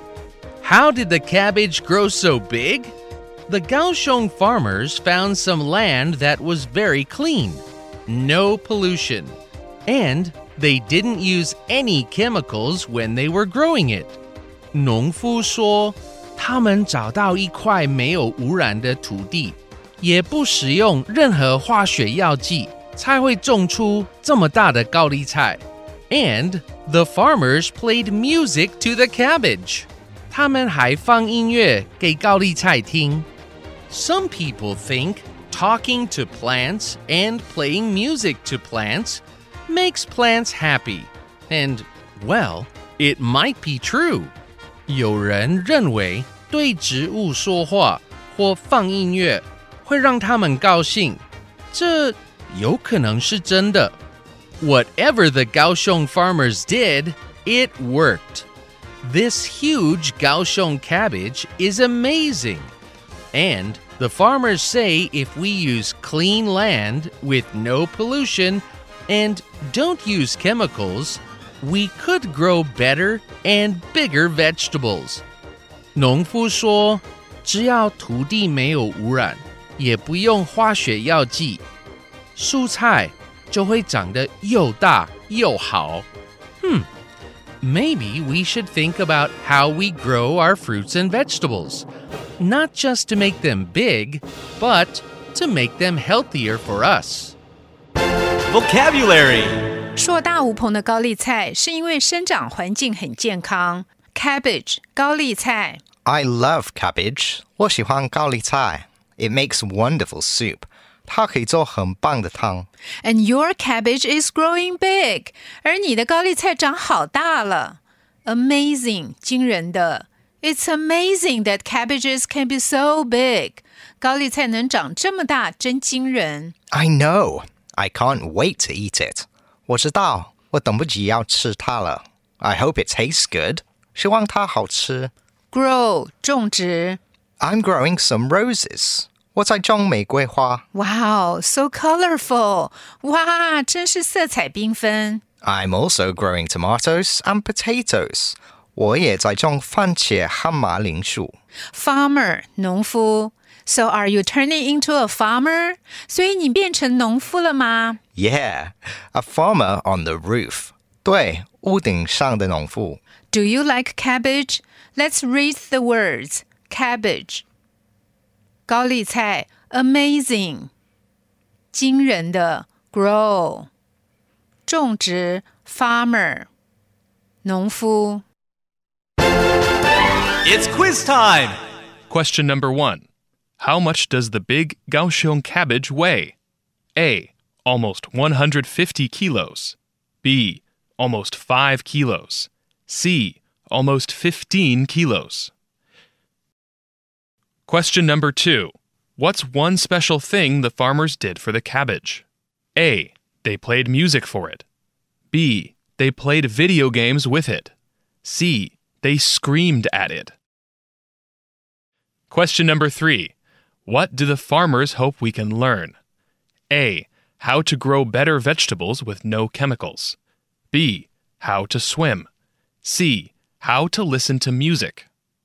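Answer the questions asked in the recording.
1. A: They played music for it.
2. A: How to grow better vegetables with no chemicals.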